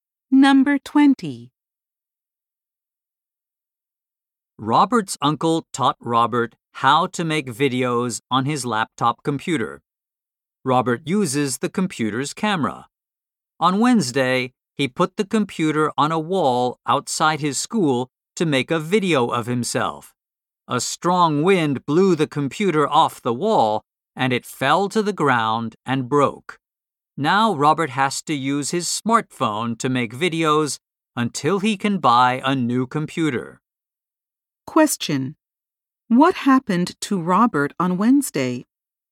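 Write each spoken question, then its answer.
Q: What happened to Robert on Wednesday?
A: His computer was blown off a wall by the wind and broke.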